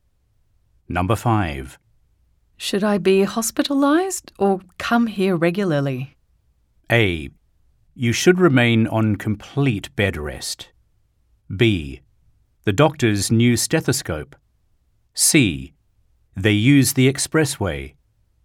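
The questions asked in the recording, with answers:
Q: Should I be hospitalized or come here regularly?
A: A: You should remain on complete bed rest.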